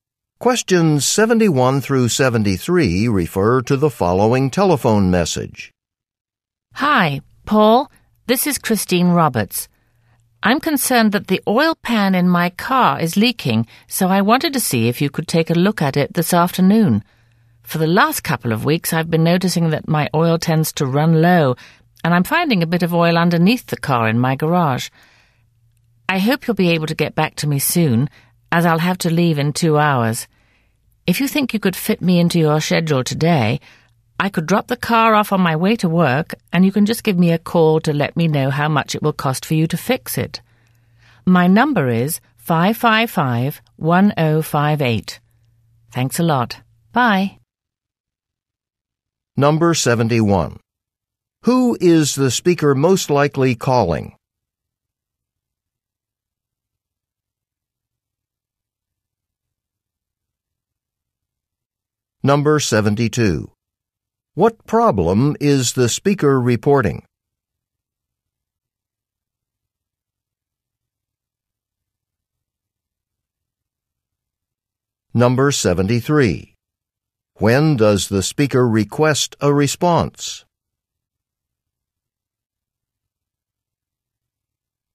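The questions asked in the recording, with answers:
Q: Who is the speaker most likely calling?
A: A car mechanic

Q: What problem is the speaker reporting?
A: Her car is leaking oil

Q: When does the speaker request a response?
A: Within 2 hours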